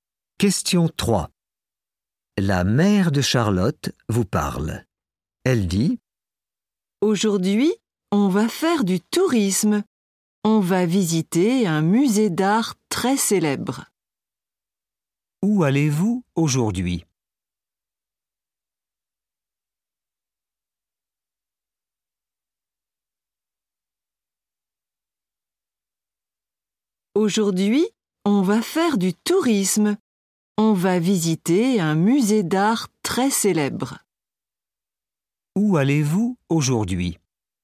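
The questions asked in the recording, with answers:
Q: Où allez-vous aujourd'hui ?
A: Dans un musée d'art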